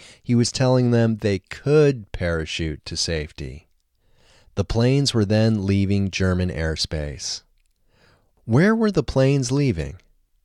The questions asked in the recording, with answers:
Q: Where were the planes leaving?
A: The planes were leaving German airspace.